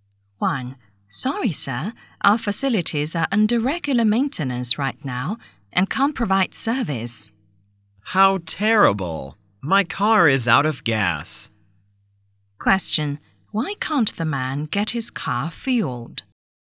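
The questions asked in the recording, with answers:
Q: Why can't the man get his car fueled?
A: The facilities are under regular maintenance.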